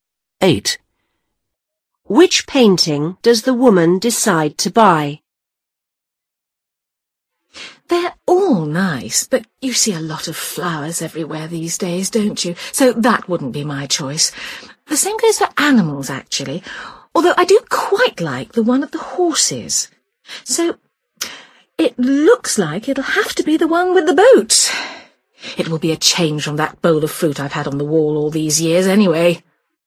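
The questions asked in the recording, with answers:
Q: Which painting does the woman decide to buy?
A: The one with the boat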